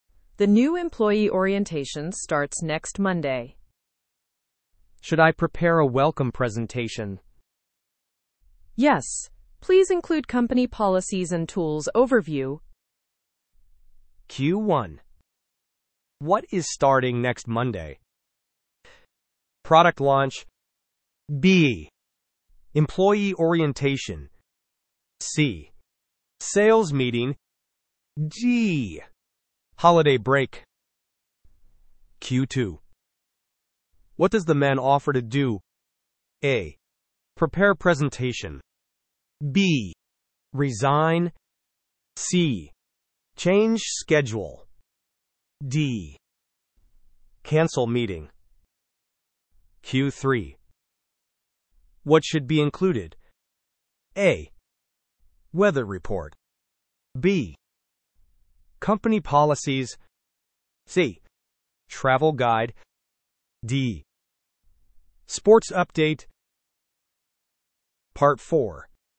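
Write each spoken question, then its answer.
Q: What is starting next Monday?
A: B: Employee orientation.

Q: What does the man offer to do?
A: A: Prepare presentation.

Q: What should be included?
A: B: Company policies.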